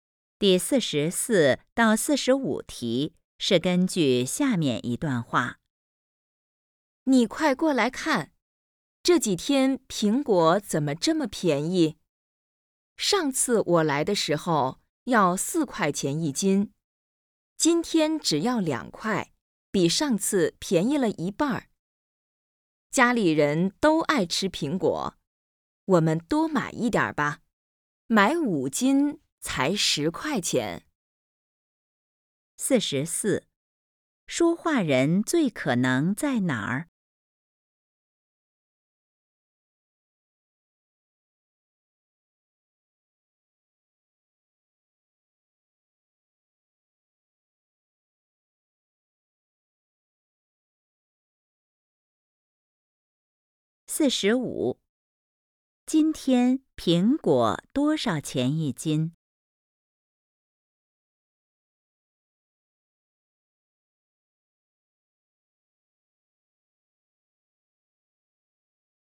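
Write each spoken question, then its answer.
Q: 今天苹果多少钱一斤?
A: 2块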